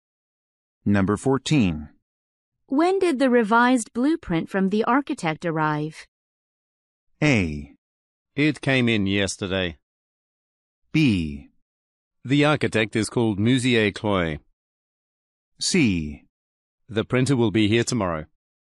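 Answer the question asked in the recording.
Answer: A: It came in yesterday.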